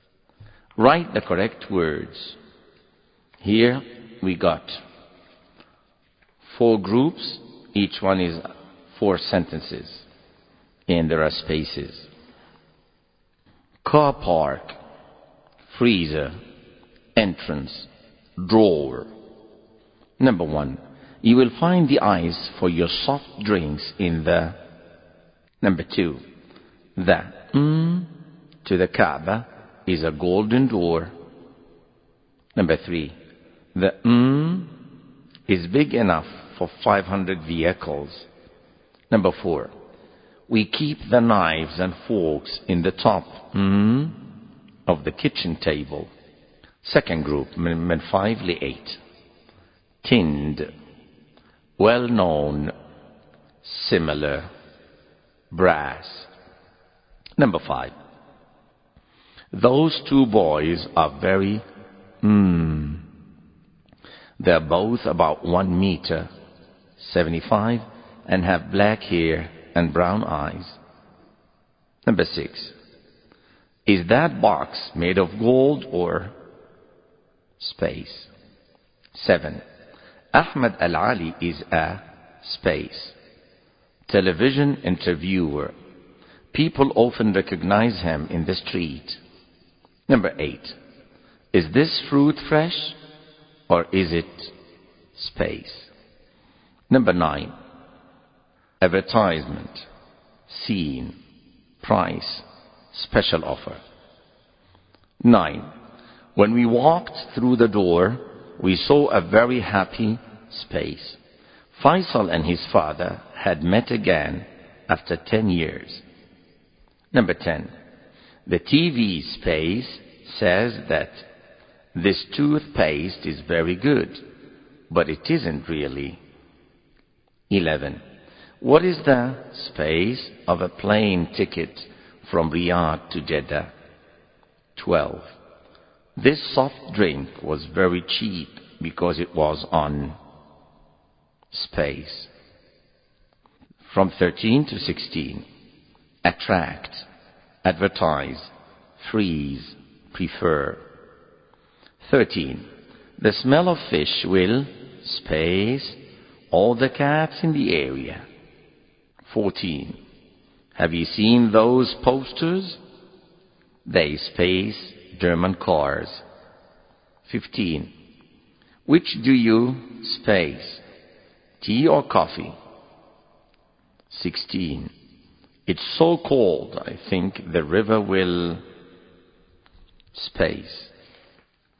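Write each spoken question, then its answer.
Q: Number one, you will find the ice for your soft drinks in the...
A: freezer

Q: Number two, the to the Kaaba is a golden door.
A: entrance

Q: Number three, the is big enough for 500 vehicles.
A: car park

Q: Number four, we keep the knives and forks in the top of the kitchen table.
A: drawer

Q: Number five, those two boys are very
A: similar

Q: Number six, is that box made of gold or space?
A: brass

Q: Seven, Ahmed Al-Ali is a space television interviewer.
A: well known

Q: Number eight, is this fruit fresh or is it space?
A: tinned

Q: Nine, when we walked through the door, we saw a very happy space.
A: scene

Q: Number 10. The TV space says that this toothpaste is very good, but it isn't really.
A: advertisement

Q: 11. What is the space of a plane ticket from Riyadh to Jeddah?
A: price

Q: 12. This soft drink was very cheap because it was on space.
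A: special offer

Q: 13, the smell of fish will space all the cats in the area.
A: attract

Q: 14, have you seen those posters?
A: advertise

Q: 15, which do you space?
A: prefer

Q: 16. It's so cold, I think the river will space.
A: freeze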